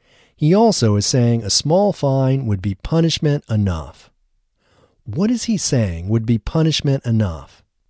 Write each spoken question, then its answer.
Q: What is he saying would be punishment enough?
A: He is saying a small fine would be punishment enough.